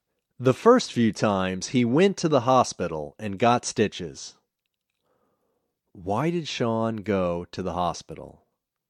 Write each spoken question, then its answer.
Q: Why did Sean go to the hospital?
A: Sean went to the hospital to get stitches.